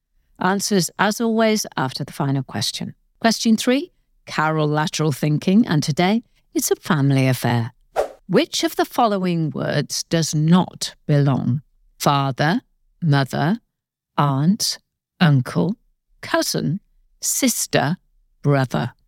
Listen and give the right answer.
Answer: And the answer I was looking for was cousin.